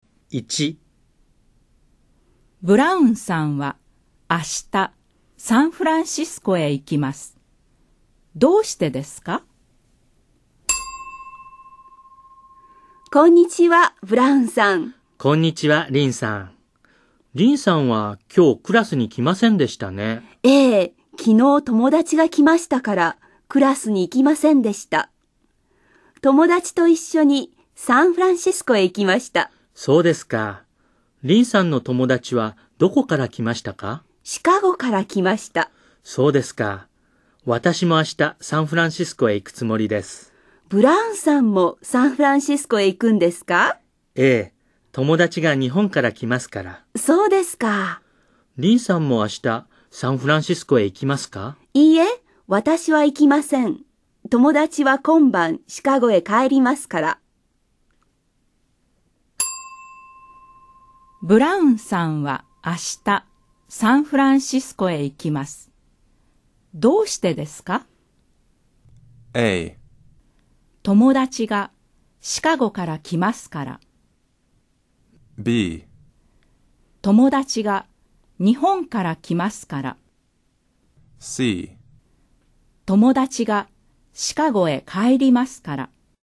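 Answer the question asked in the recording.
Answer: B: 友達が日本から来ますから。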